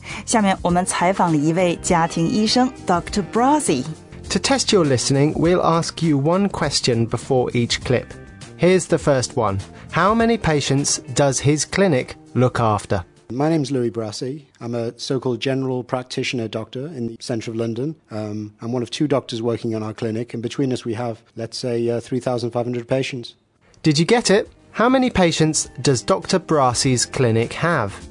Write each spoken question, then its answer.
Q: How many patients does his clinic look after?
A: 3,500? Yes, 3,500 patients to look after between two GPs.